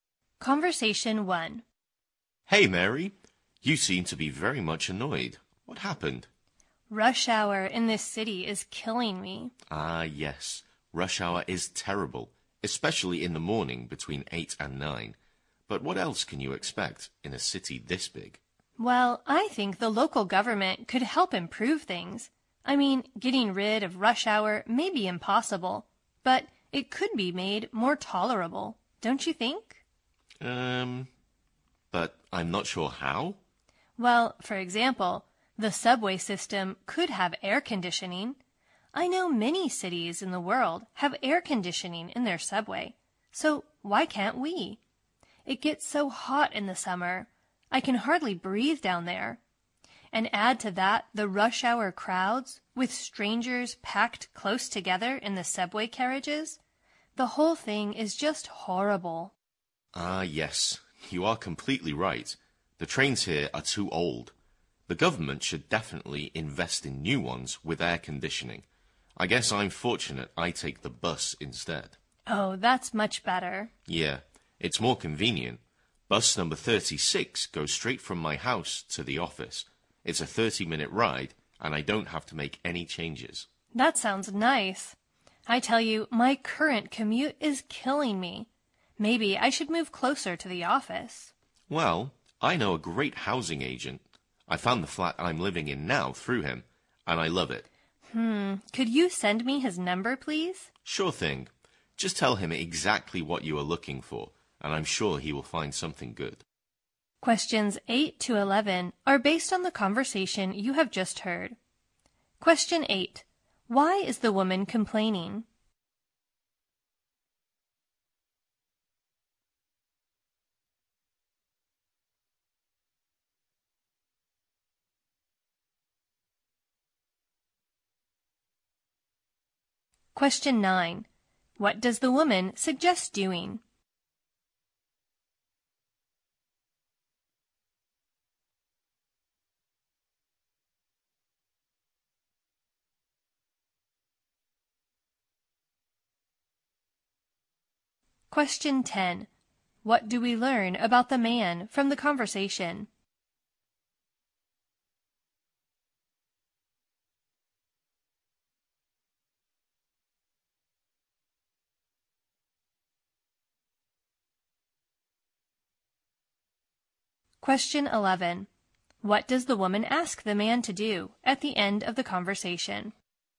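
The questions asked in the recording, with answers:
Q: Why is the woman complaining?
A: Rush hour in the city is terrible.

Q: What does the woman ask the man to do at the end of the conversation?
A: Send her the housing agent's number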